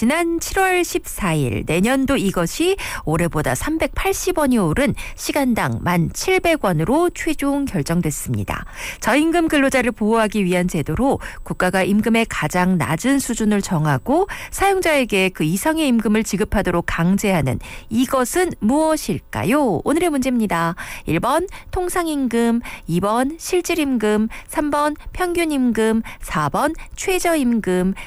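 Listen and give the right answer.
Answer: 4: 최저임금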